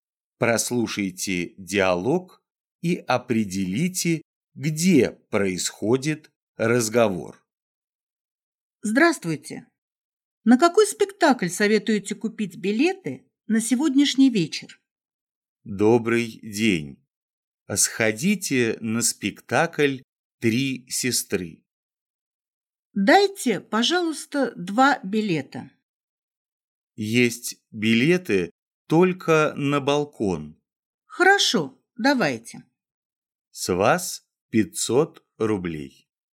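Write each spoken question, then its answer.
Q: Прослушайте диалог и определите, где происходит разговор.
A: В театре (в театральной кассе)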